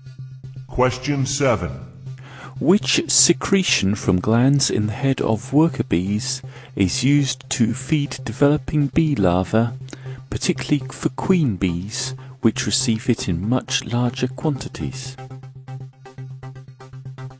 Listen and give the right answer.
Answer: that secretion used to feed bee larvae is royal jelly